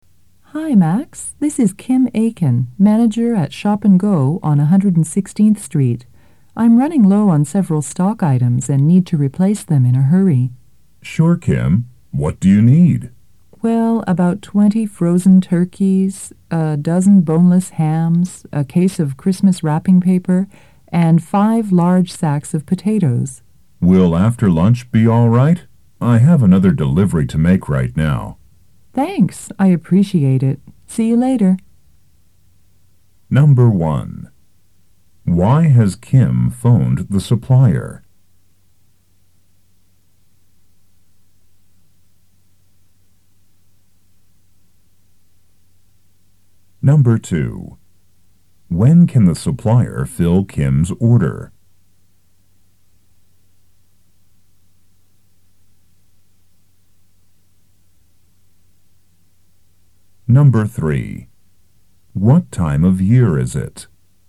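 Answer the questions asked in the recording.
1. She is running low on several stock items and needs them replaced quickly
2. After lunch
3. Christmas time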